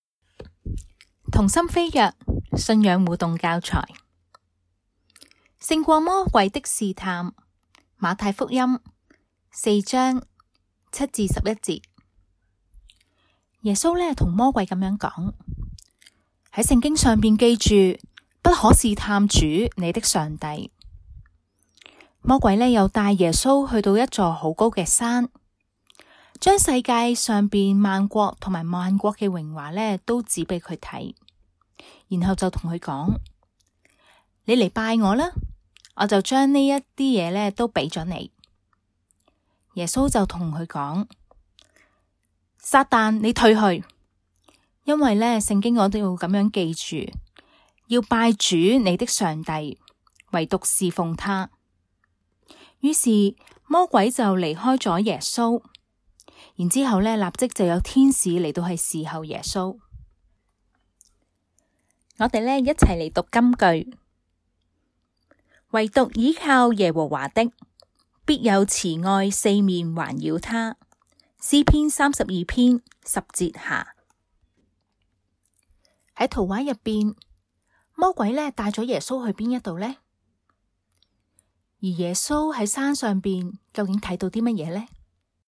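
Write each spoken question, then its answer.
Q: 魔鬼带了耶稣去哪一度呢?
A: 一座好高嘅山

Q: 而耶稣在山上究竟看到什么呢?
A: 世界上边万国同埋万国嘅荣华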